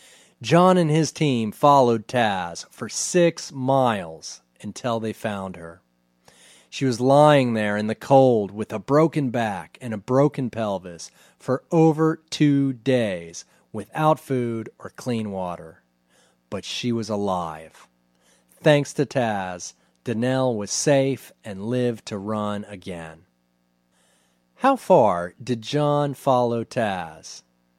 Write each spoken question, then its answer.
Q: How far did John follow Taz?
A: John followed Taz for 6 miles.